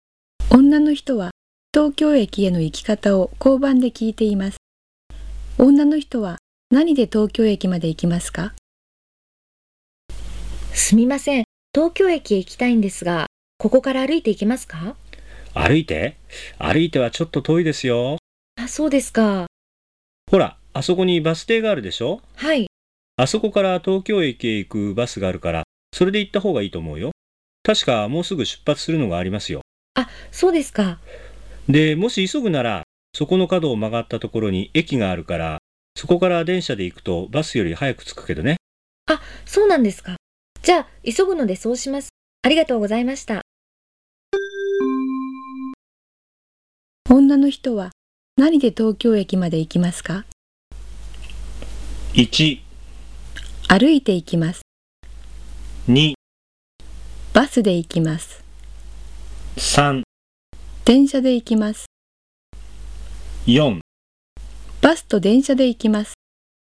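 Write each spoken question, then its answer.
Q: 女の人は何で東京駅まで行きますか?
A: 3: 電車で行きます。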